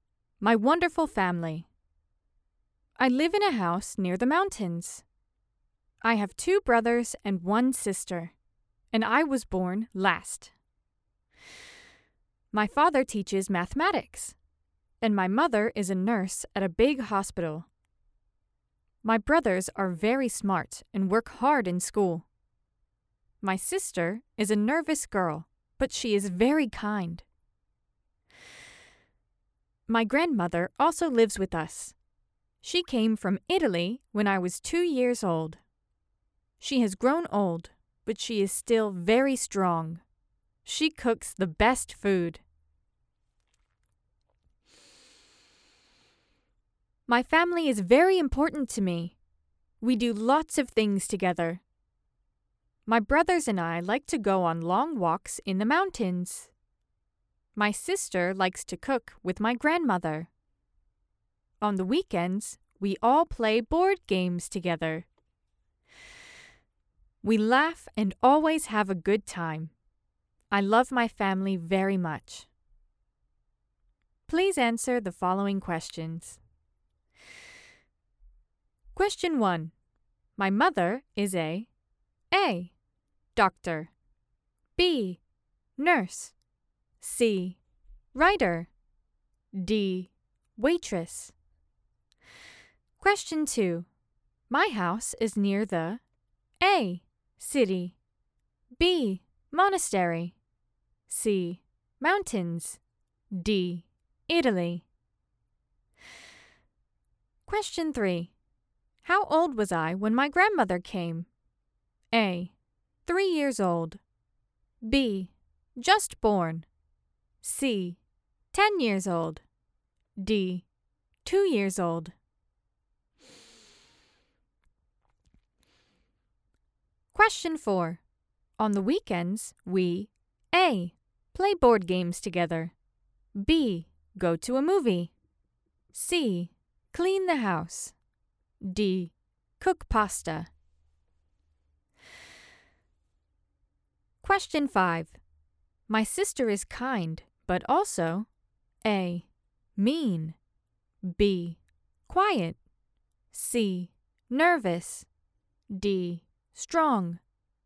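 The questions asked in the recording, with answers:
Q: My mother is a A.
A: B: Nurse

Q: My house is near the A.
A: C: Mountains

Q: How old was I when my grandmother came?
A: D: 2 years old

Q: On the weekends, we A.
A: A: play board games together

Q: My sister is kind, but also A.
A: C: nervous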